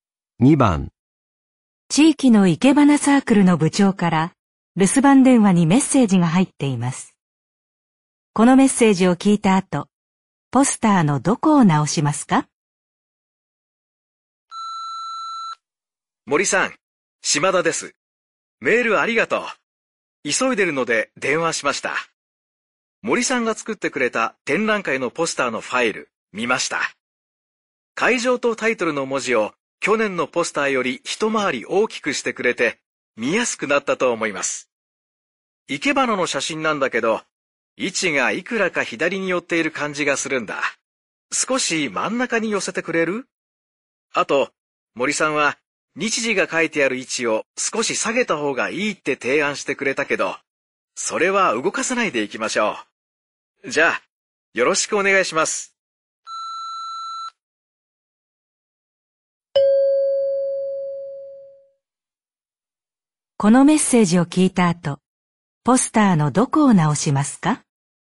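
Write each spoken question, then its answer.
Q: このメッセージを聞いた後、ポスターのどこを直しますか?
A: 生け花の写真の位置を少し真ん中に寄せる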